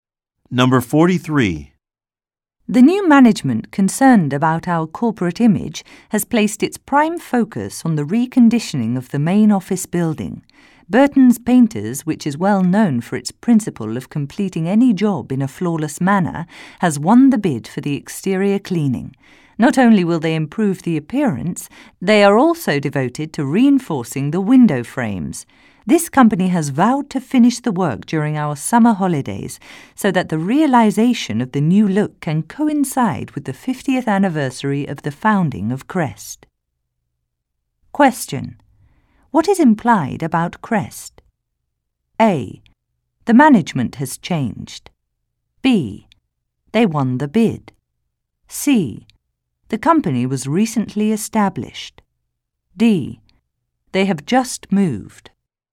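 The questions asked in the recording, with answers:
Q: What is implied about Crest?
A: A: The management has changed.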